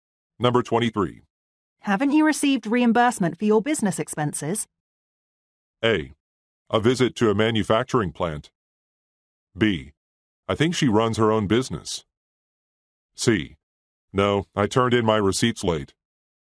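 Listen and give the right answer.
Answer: C: No, I turned in my receipts late.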